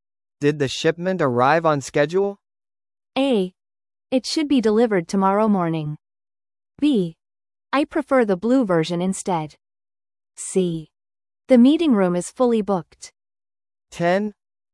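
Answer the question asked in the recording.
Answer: A: It should be delivered tomorrow morning.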